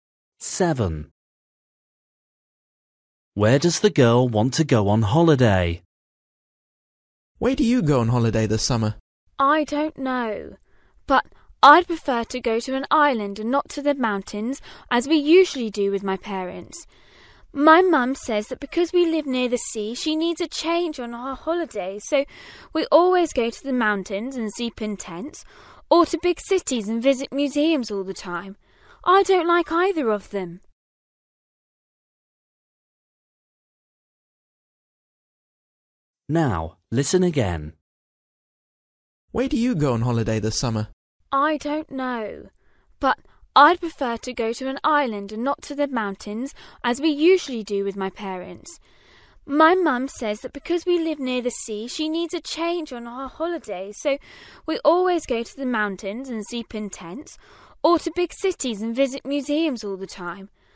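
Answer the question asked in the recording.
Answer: to an island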